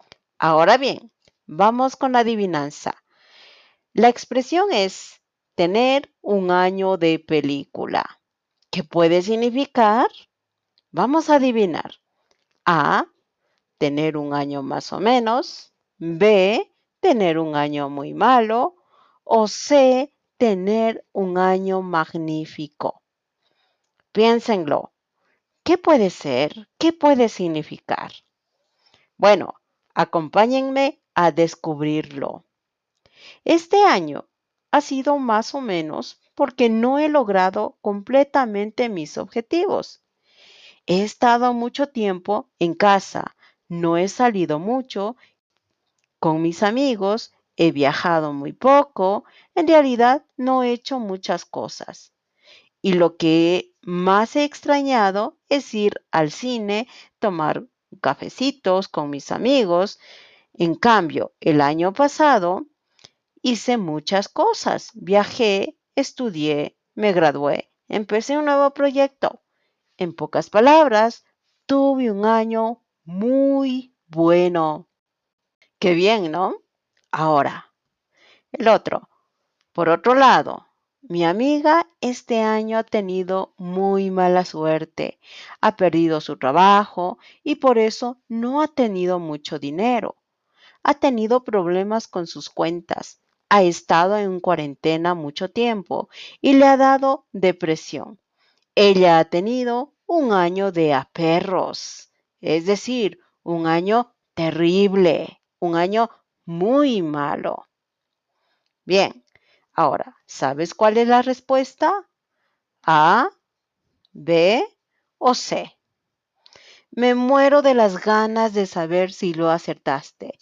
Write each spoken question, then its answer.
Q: ¿Qué puede significar?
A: La respuesta es C.